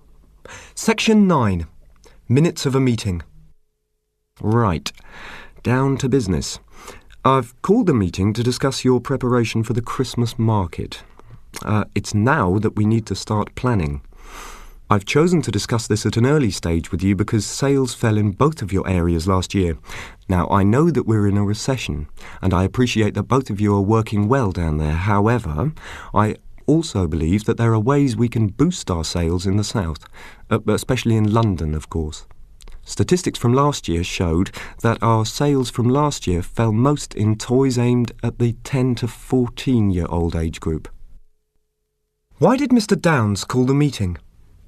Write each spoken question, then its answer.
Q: Why did Mr. Downs call the meeting?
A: He called the meeting to discuss preparation for the Christmas market.